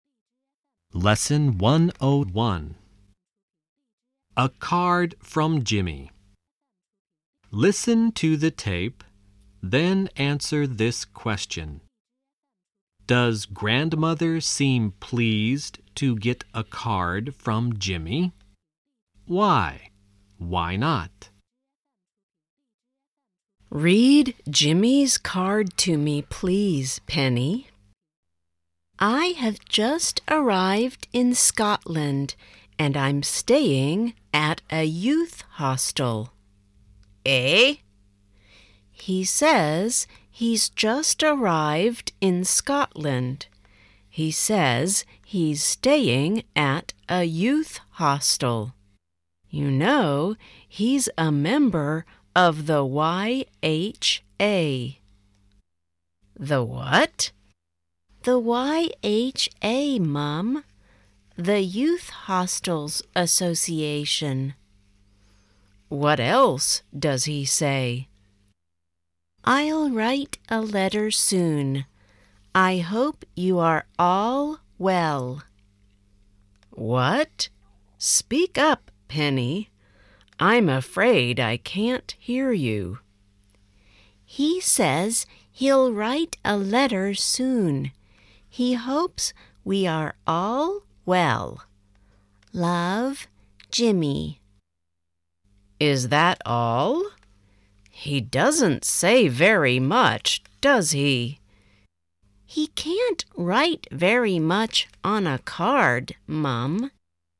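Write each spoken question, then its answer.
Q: Does grandmother seem pleased to get a card from Jimmy?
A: No, she thinks he doesn't say very much on the card.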